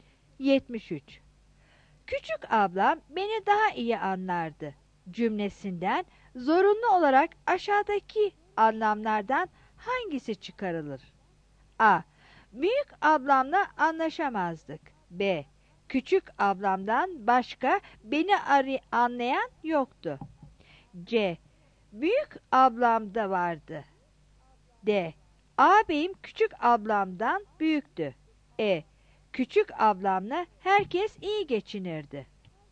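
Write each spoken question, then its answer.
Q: Küçük ablam beni daha iyi anlardı cümlesinden zorunlu olarak aşağıdaki anlamlardan hangisi çıkarılır?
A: C: Büyük ablam da vardı.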